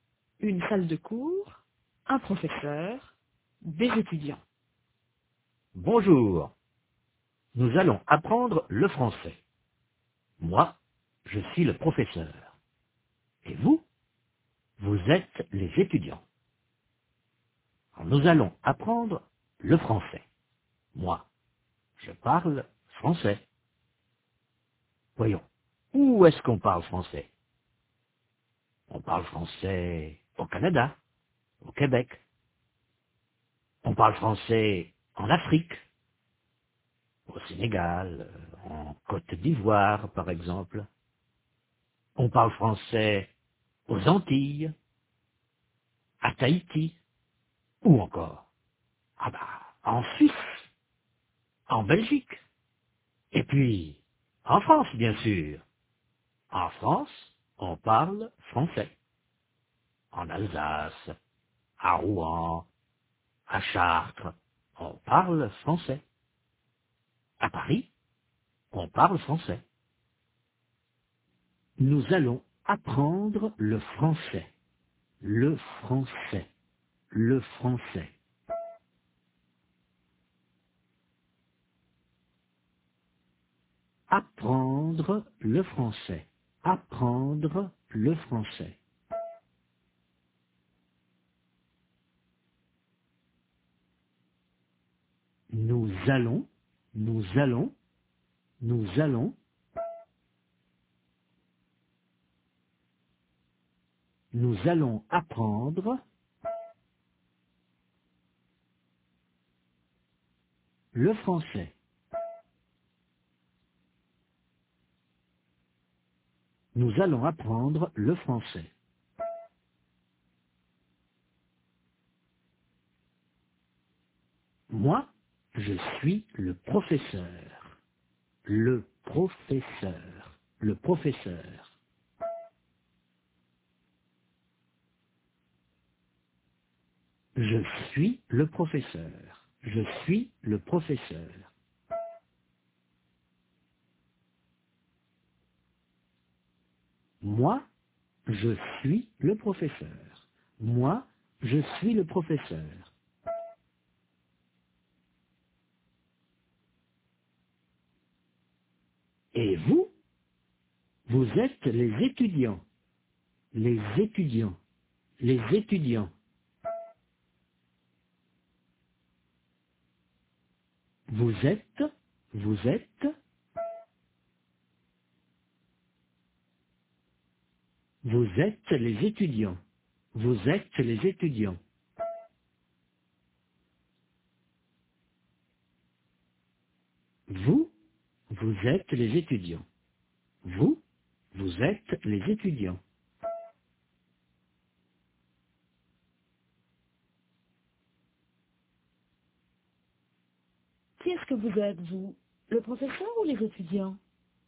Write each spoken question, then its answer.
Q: Que vous êtes, vous, le professeur ou les étudiants?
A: Les étudiants.